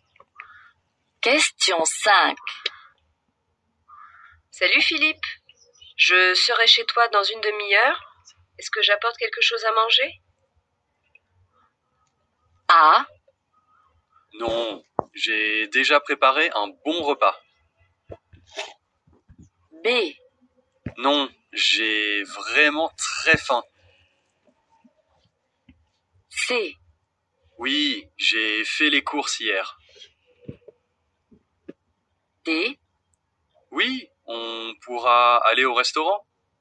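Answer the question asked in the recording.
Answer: A: Non, j'ai déjà préparé un bon repas.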